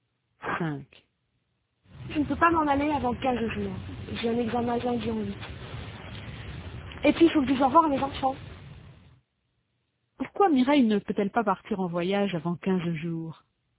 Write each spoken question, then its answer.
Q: Pourquoi Mireille ne peut-elle pas partir en voyage avant 15 jours?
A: Parce qu'elle a un examen de lundi en 8 et qu'il faut qu'elle dise au revoir à ses enfants.